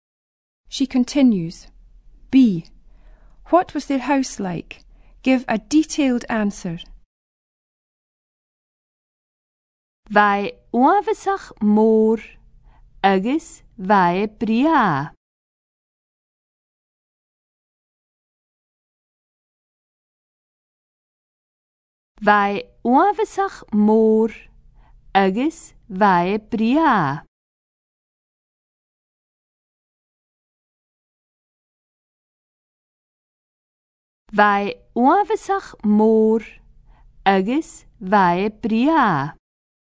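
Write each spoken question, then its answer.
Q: What was their house like?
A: Very big and beautiful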